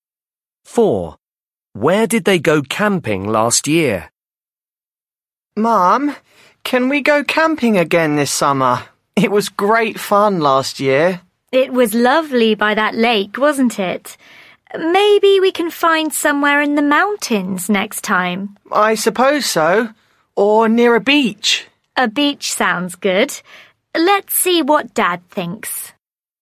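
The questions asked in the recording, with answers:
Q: Where did they go camping last year?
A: by a lake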